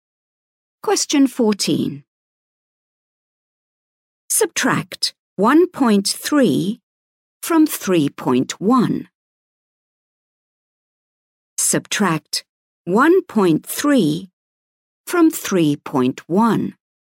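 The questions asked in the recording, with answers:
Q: Subtract 1.3 from 3.1.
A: 1.8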